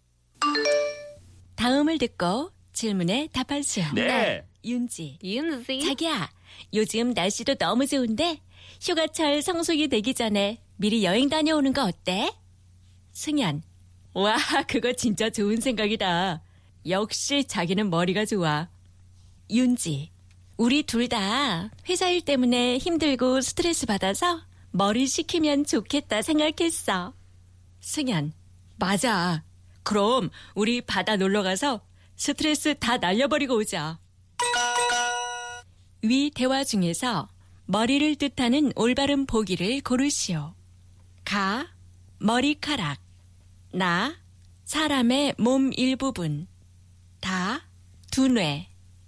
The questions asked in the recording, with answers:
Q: 위 대화 중에서 머리를 뜻하는 올바른 보기를 고르시오.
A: 두 뇌, apparently brain, 다 is correct